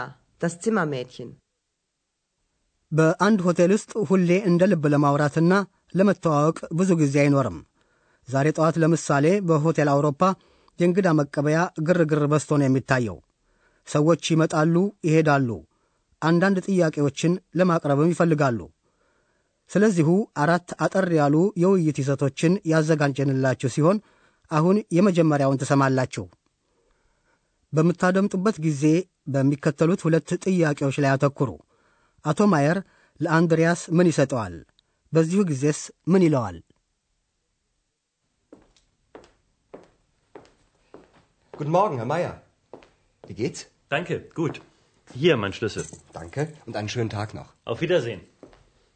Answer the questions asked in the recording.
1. አቶ ማየር ቁልፉን ከጠረጴዛው ላይ ያኖርና
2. ቁልፌ ይሄው ይላል።